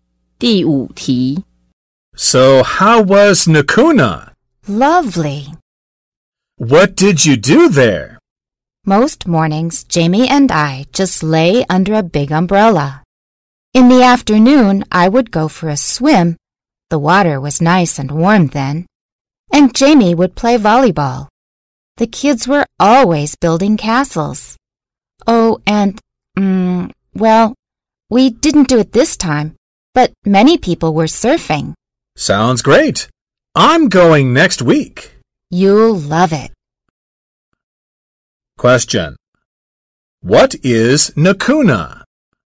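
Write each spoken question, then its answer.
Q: What is Nakuna?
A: A beach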